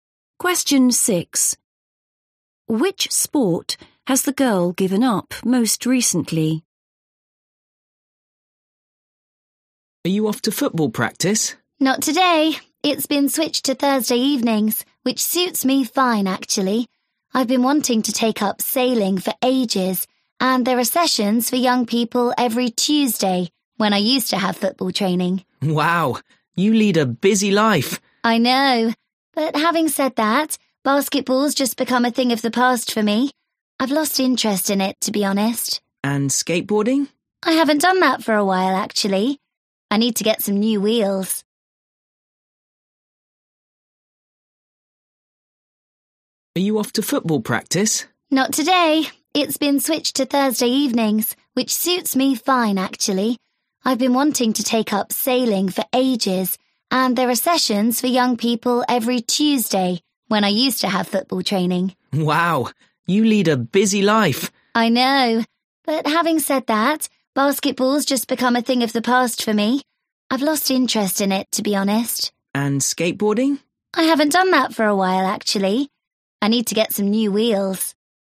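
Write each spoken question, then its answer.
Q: Which sport has the girl given up most recently?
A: basketball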